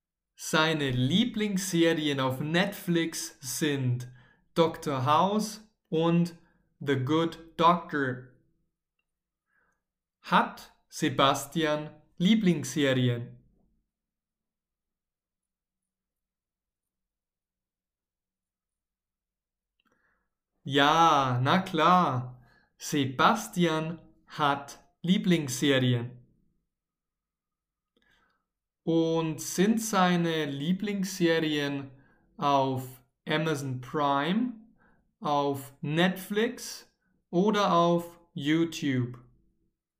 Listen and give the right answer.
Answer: Auf Netflix. Seine Lieblingsserien sind auf Netflix.